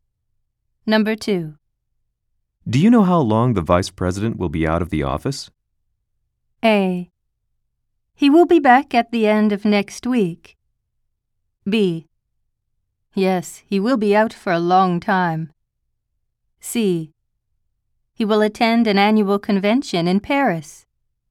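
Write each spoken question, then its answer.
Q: Do you know how long the vice president will be out of the office?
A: A: He will be back at the end of next week.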